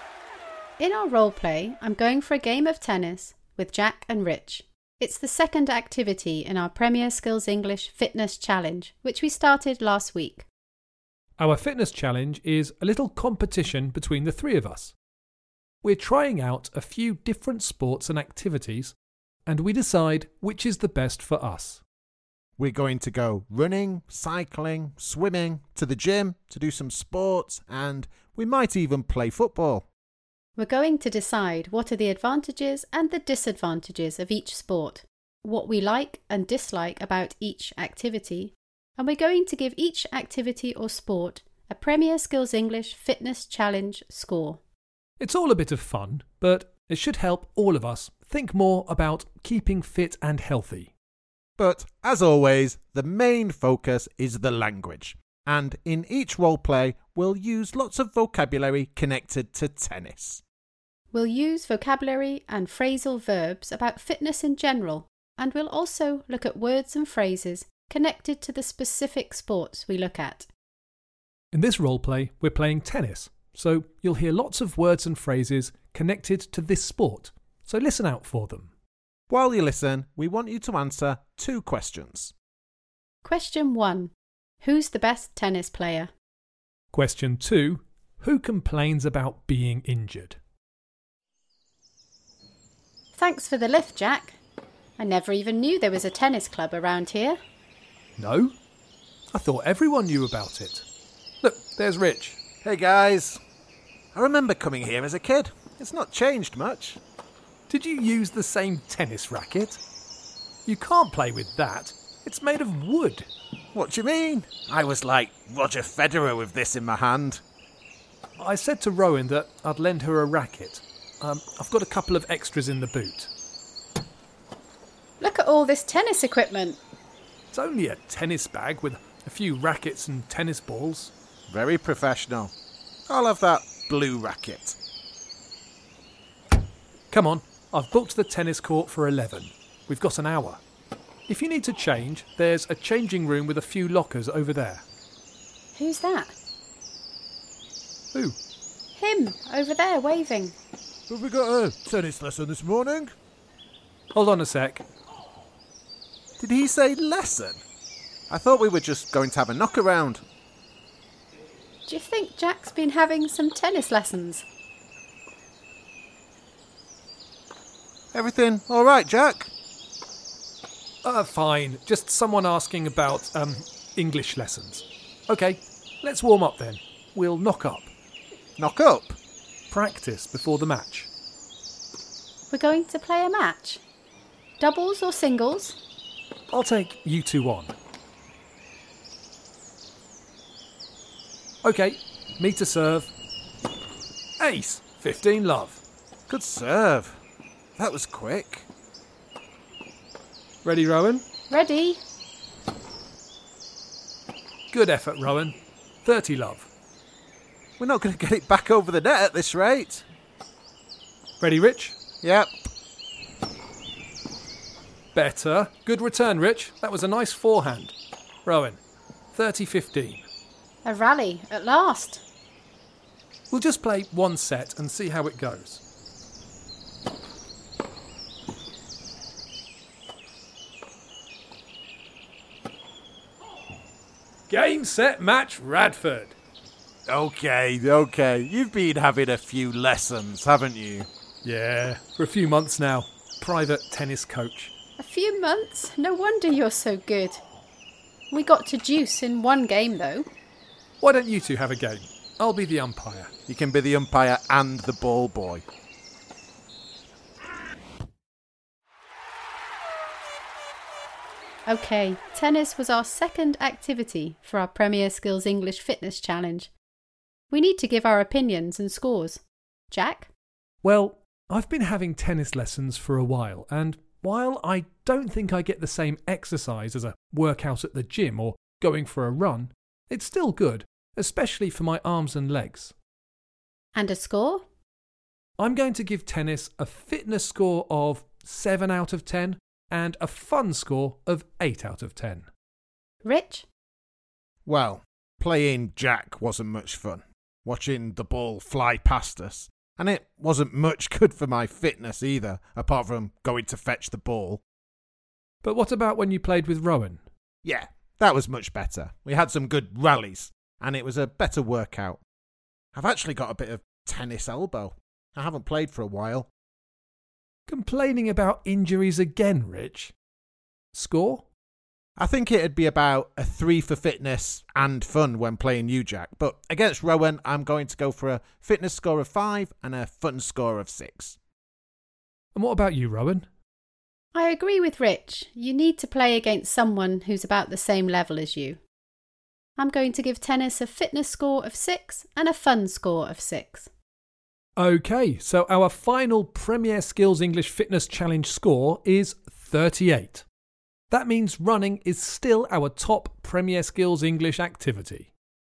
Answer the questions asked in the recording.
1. The answer is, Jack is the best tennis player.
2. The answer, of course, is Rich.